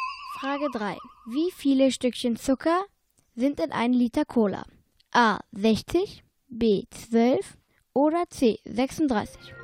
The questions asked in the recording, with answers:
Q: Wie viele Stückchen Zucker sind in einem Liter Cola?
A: Mit Antwort C liegt ihr richtig.